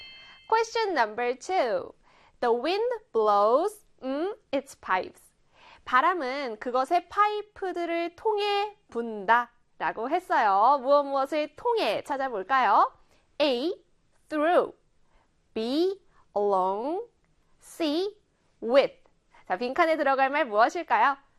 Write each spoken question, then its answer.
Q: 무엇을 통해 찾아볼까요? A. Through. B. Along. C. With. 자, 빈칸에 들어갈 말 무엇일까요?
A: A의 through 골라주시면 됩니다.